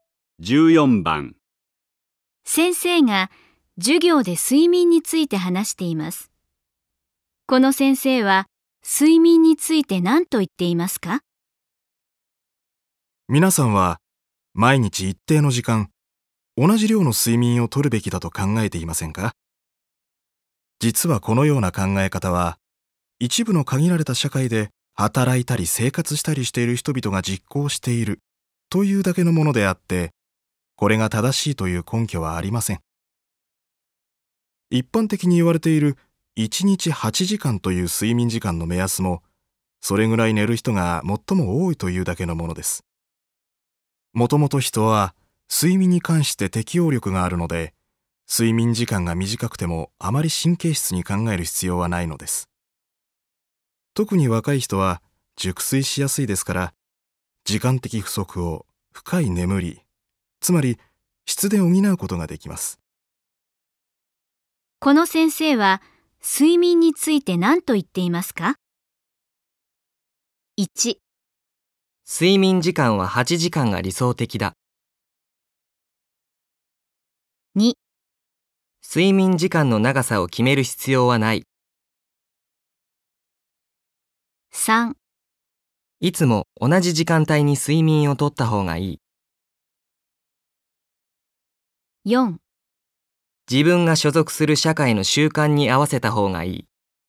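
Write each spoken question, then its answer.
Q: この先生は睡眠について何と言っていますか?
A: 2: 睡眠時間の長さを決める必要はない。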